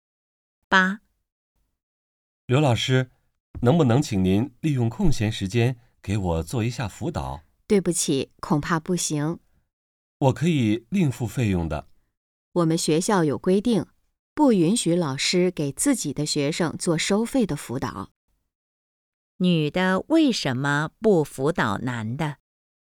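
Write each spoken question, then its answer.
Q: 女的为什么不辅导男的?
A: 学校规定不允许老师给自己的学生做收费辅导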